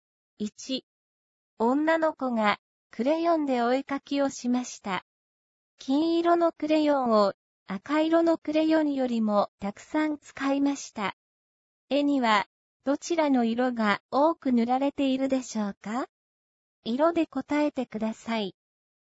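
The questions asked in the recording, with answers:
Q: 絵にはどちらの色が多く塗られているでしょうか?色で答えてください。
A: 金色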